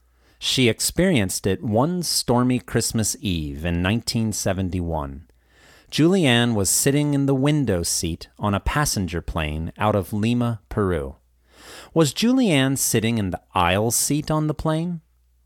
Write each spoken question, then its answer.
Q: Was Julianne sitting in the aisle seat on the plane?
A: No, she was sitting in the window seat.